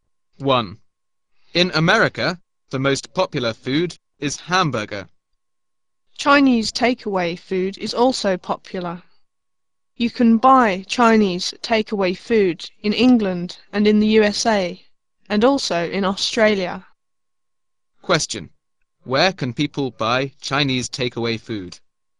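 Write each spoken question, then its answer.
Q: Where can people buy Chinese takeaway food?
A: In England, the USA and Australia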